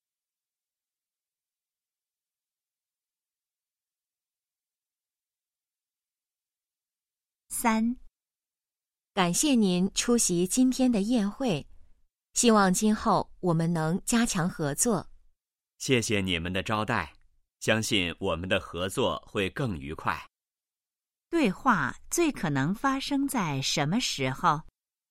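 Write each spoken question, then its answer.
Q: 对话最可能发生在什么时候?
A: 宴会上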